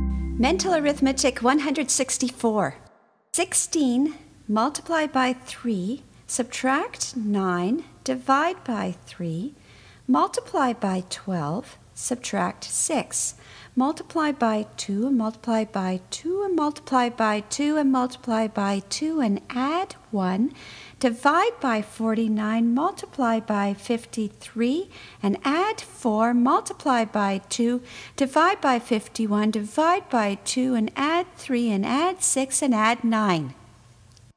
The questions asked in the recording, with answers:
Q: 16 multiply by 3, subtract 9, divide by 3, multiply by 12, subtract 6. Multiply by 2 and multiply by 2 and multiply by 2 and multiply by 2 and add 1. Divide by 49, multiply by 53 and add 4. Multiply by 2, divide by 51, divide by 2 and add 3 and add 6 and add 9.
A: And the answer is 69.